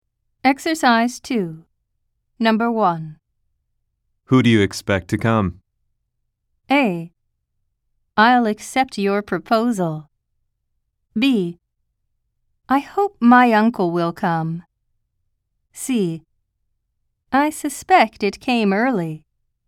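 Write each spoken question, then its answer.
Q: Who do you expect to come?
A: B: I hope my uncle will come.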